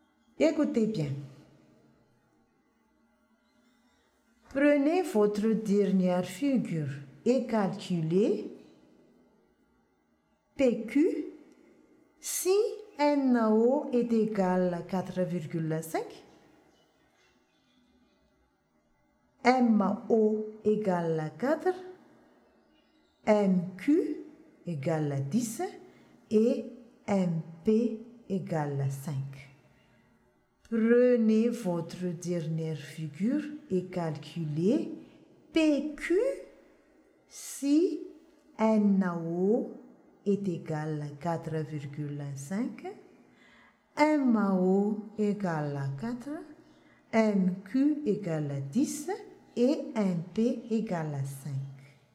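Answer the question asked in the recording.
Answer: PQ = 11,25 cm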